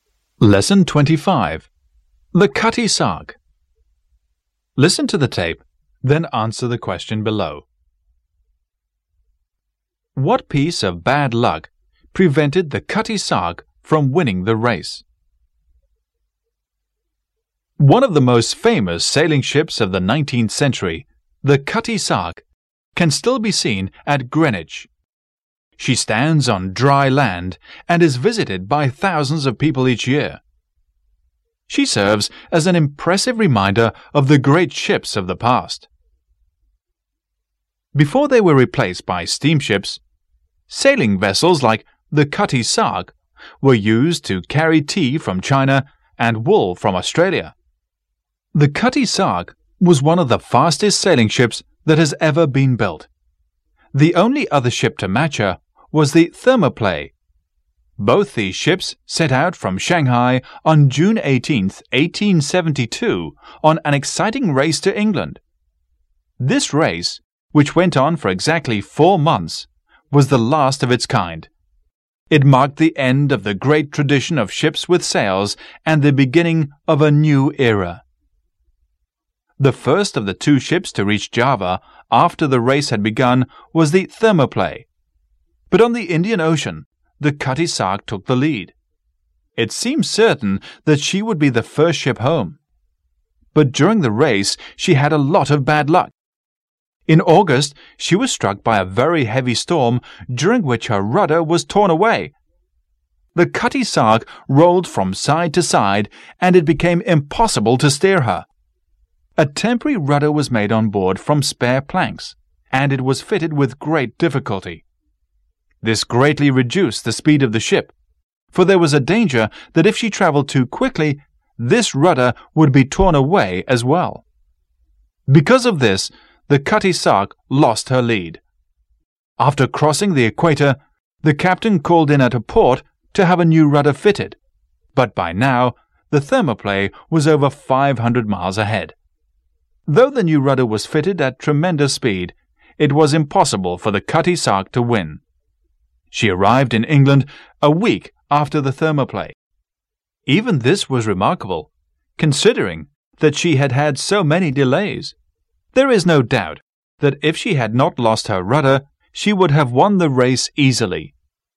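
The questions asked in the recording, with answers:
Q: What piece of bad luck prevented the Cutty Sark from winning the race?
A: She lost her rudder in a heavy storm.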